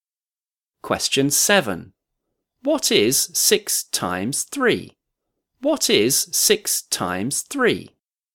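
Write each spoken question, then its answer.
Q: What is 6 times 3?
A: 18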